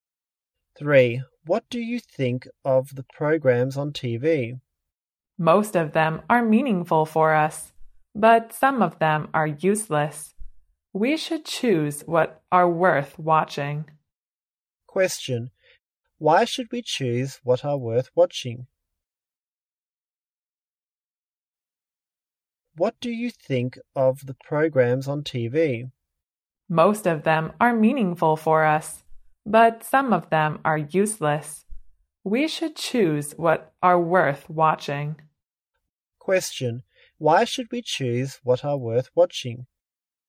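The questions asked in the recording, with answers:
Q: Why should we choose what are worth watching?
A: Because some programs are useless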